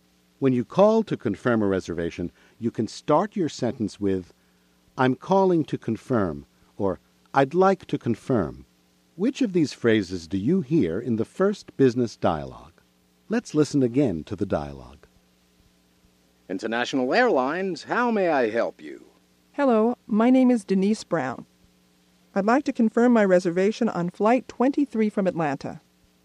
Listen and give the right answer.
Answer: Ms. Brown said, I'd like to confirm.